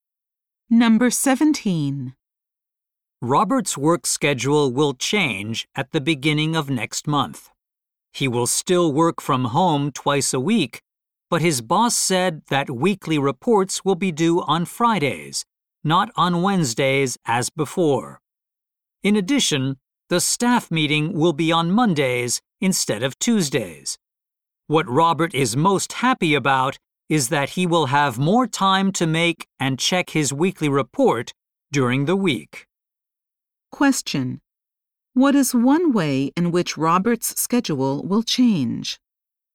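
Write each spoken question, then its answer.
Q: What is one way in which Robert's schedule will change?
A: His weekly reports will be due on Fridays.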